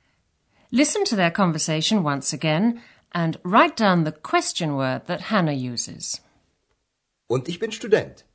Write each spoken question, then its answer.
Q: write down the question word that Hannah uses.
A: The answer is what? Was.